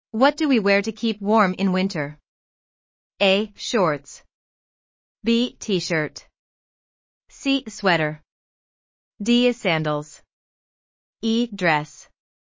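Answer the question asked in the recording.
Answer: C: Sweater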